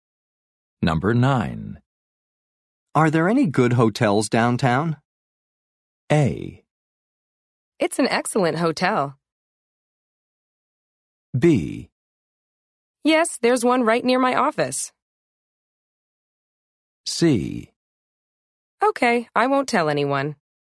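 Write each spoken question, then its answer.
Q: Are there any good hotels downtown?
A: B: Yes, there's one right near my office.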